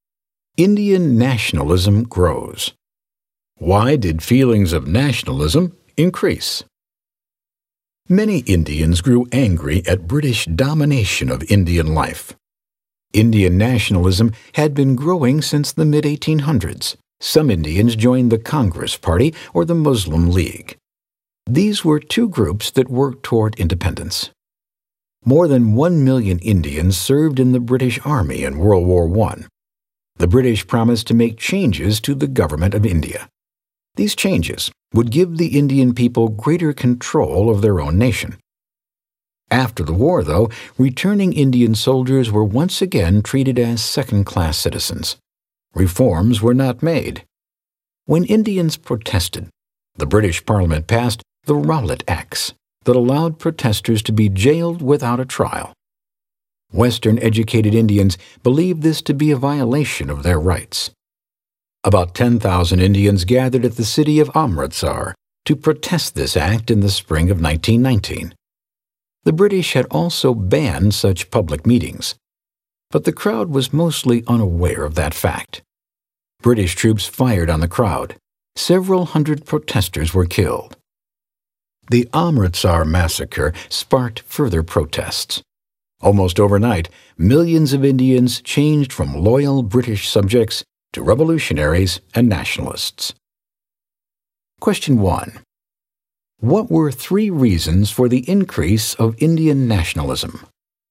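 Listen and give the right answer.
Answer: Anger at British domination, broken British promises of reform after WWI, and the Rowlatt Acts and Amritsar massacre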